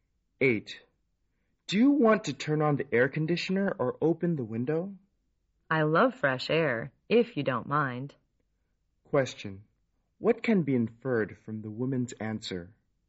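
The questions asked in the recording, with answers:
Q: What can be inferred from the woman's answer?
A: She would prefer to open the window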